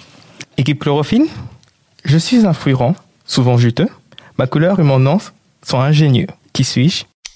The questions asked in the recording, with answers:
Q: Je suis un fruit rond, souvent juteux. Ma couleur et mon nom sont ingénieux. Qui suis-je ?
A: L'orange.